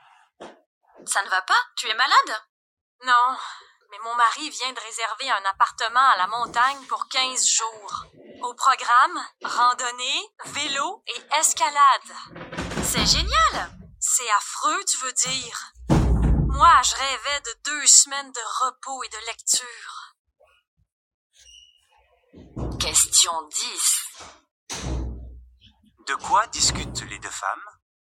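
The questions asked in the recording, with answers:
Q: De quoi discutent les deux femmes?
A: De vacances sportives à la montagne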